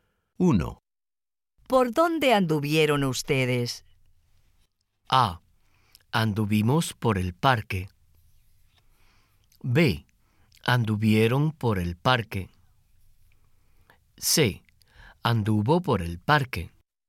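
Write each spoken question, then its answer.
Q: ¿Por dónde anduvieron ustedes?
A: A: Anduvimos por el parque.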